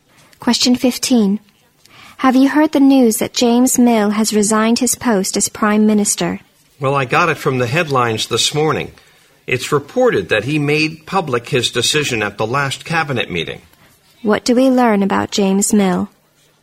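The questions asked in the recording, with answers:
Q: What do we learn about James Mill?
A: He has resigned as Prime Minister.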